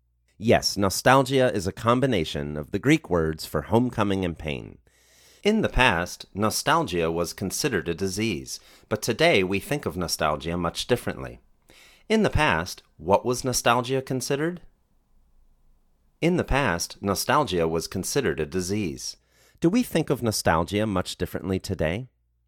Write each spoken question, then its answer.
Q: In the past, what was nostalgia considered?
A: In the past, nostalgia was considered a disease.

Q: Do we think of nostalgia much differently today?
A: Yes, we think of nostalgia much differently today.